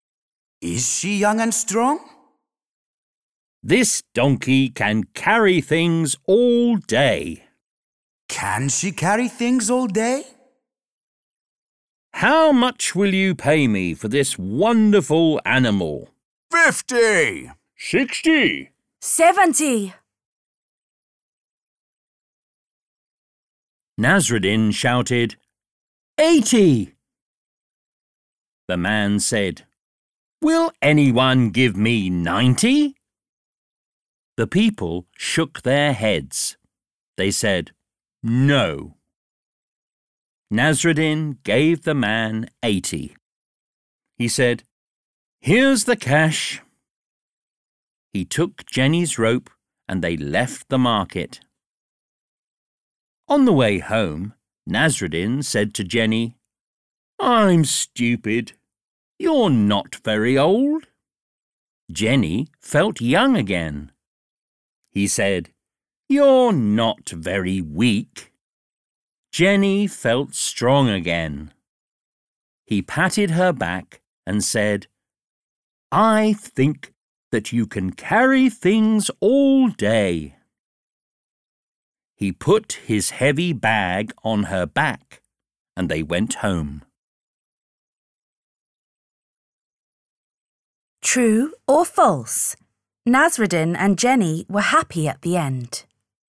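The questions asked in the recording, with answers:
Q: True or false? Nasreddin and Jenny were happy at the end.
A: True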